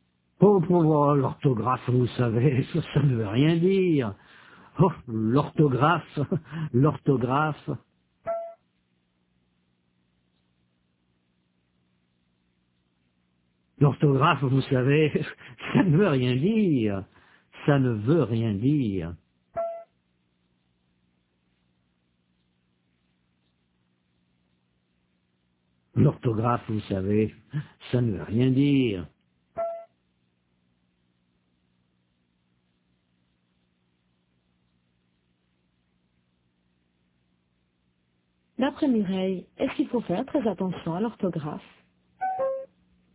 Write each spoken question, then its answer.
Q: D'après Mireille, est-ce qu'il faut faire très attention à l'orthographe?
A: Non, l'orthographe, ça ne veut rien dire.